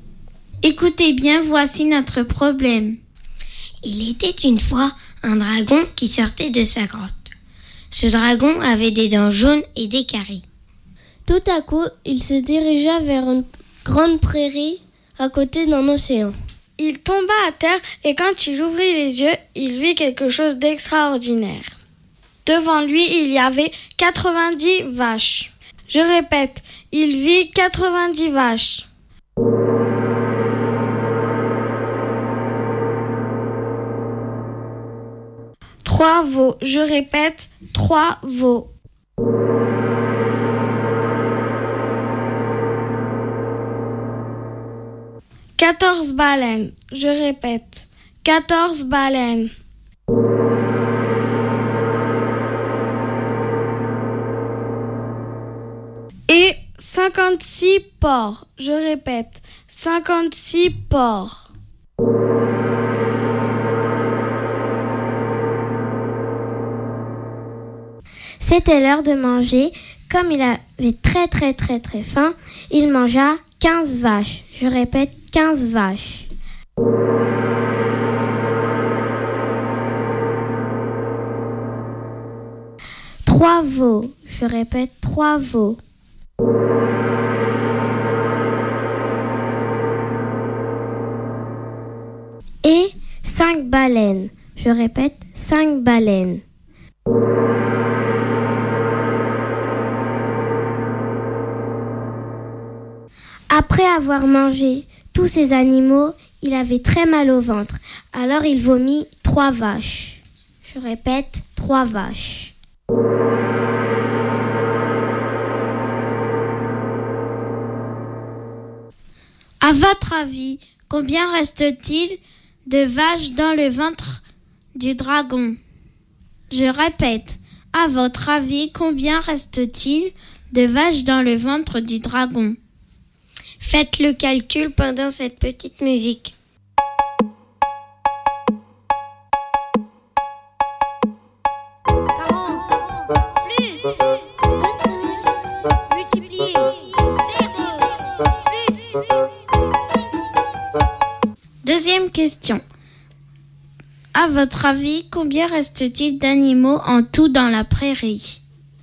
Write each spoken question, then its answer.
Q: À votre avis, combien reste-t-il de vaches dans le ventre du dragon ?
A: Eh bien, il reste 12 vaches dans le ventre du dragon.